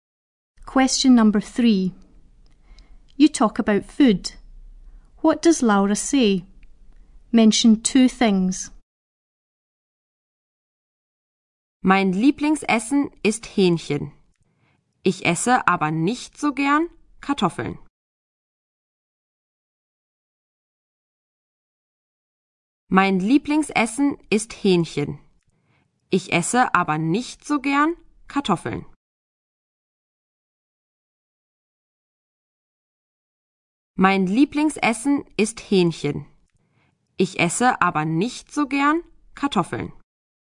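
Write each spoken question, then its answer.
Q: What does Laura say? Mention two things.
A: Her favourite food is chicken; she doesn't like potatoes much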